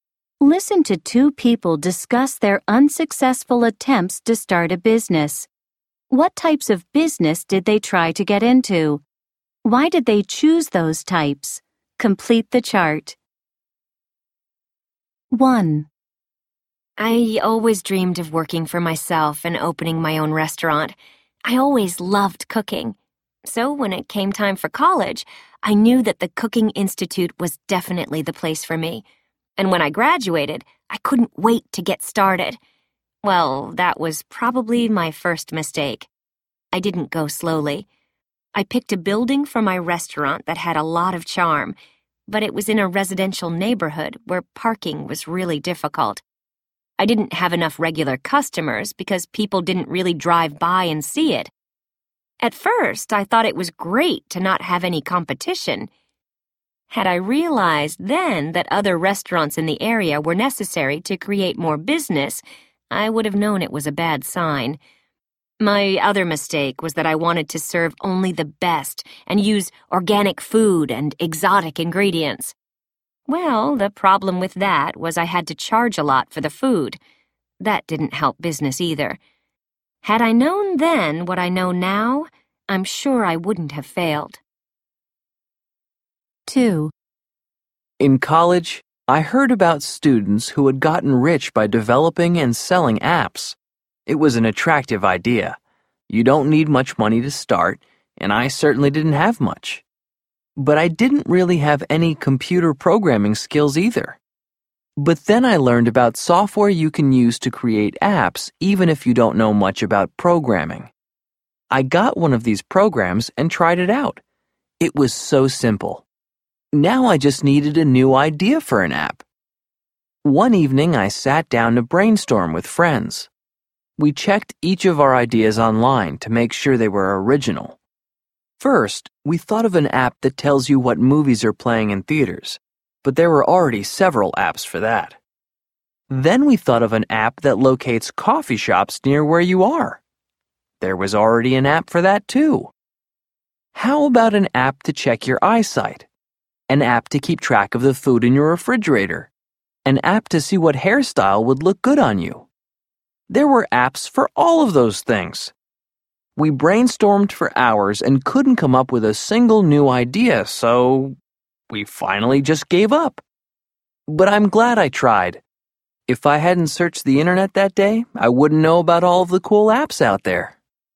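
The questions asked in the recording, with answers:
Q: What types of business did they try to get into?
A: Speaker 1: a restaurant; Speaker 2: developing and selling apps

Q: Why did they choose those types?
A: Speaker 1 always loved cooking and dreamed of working for herself; Speaker 2 heard students got rich selling apps, and you don't need much money to start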